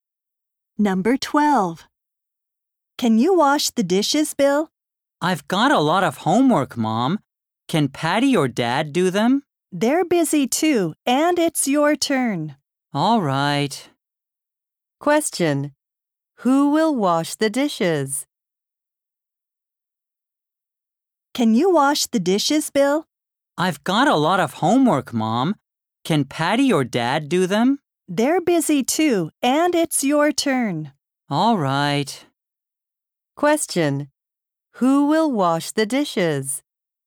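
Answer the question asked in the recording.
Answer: Bill.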